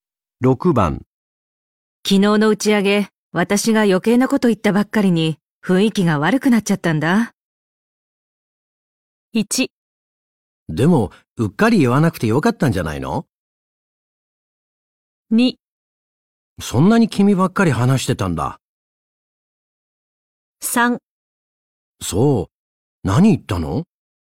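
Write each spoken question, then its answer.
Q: 昨日の打ち上げ、私が余計なこと言った ばっかりに雰囲気が悪くなっちゃったんだ。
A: 3: そう、何言ったの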